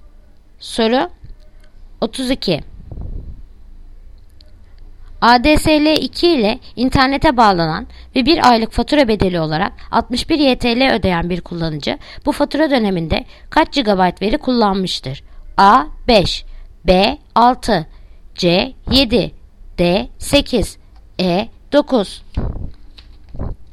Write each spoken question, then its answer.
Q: ADSL 2 ile internete bağlanan ve 1 aylık fatura bedeli olarak 61 YTL ödeyen bir kullanıcı bu fatura döneminde kaç GB veri kullanmıştır?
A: Yanıt Edirne 9